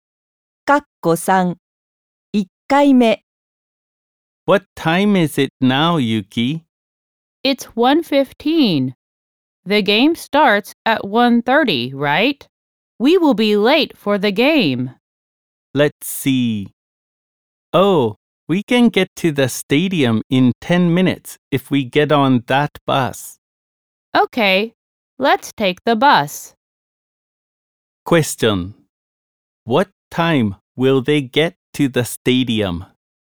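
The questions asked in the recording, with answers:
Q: What time will they get to the stadium?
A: At 1:25.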